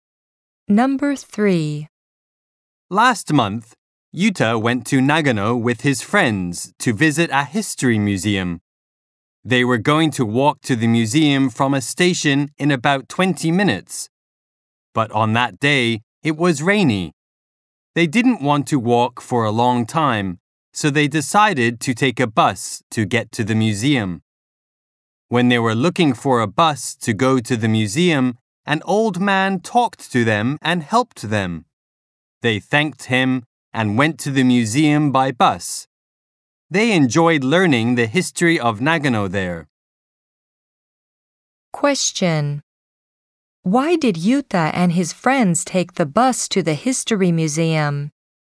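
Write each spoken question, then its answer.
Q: Why did Yuta and his friends take the bus to the history museum?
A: Because it was rainy and they didn't want to walk for a long time.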